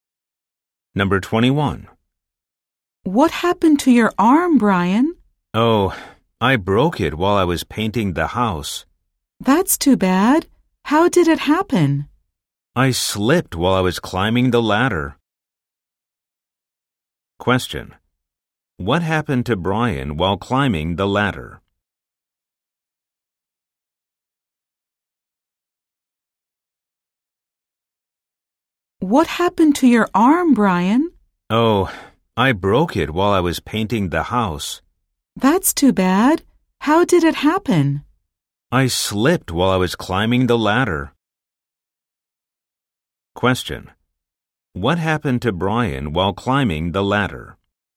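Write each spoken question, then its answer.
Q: What happened to Brian while climbing the ladder?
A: He slipped and broke his arm.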